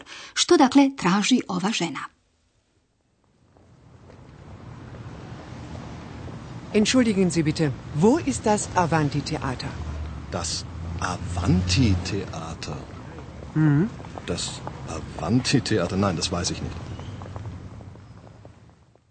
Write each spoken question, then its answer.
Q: Što dakle traži ova žena?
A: Sigurno ste uspjeli prepoznati da žena traži neko kazalište, teater, teater.